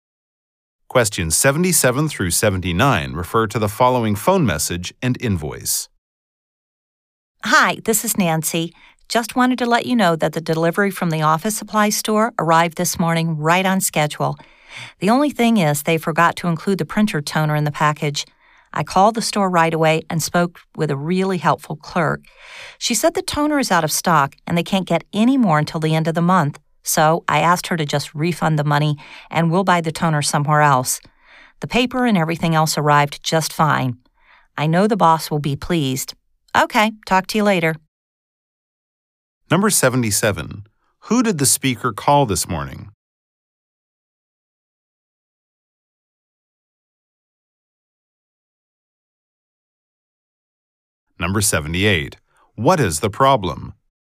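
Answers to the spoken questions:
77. The office supply store
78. The printer toner was missing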